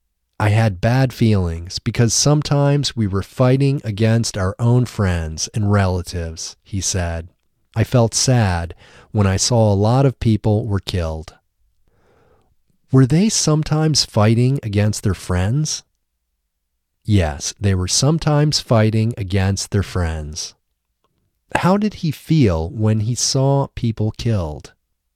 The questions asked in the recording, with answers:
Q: How did he feel when he saw people killed?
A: He felt sad when he saw people killed.